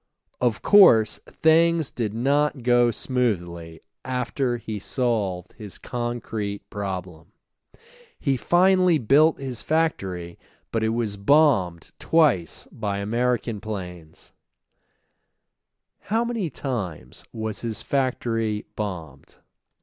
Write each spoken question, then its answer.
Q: How many times was his factory bombed?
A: His factory was bombed twice.